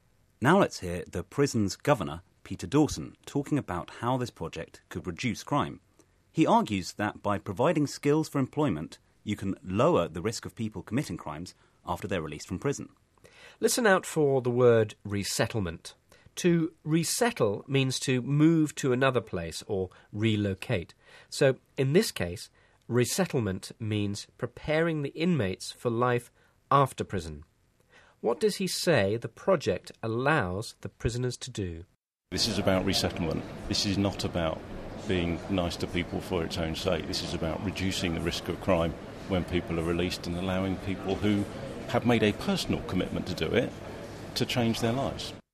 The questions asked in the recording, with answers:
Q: What does he say the project allows the prisoners to do?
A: He says the restaurant scheme can reduce crime as it allows ex-prisoners to change their lives rather than return to crime.